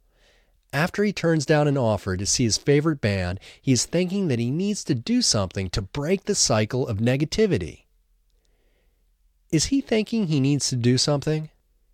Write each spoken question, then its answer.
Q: Is he thinking he needs to do something?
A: Yes, he is thinking that he needs to do something.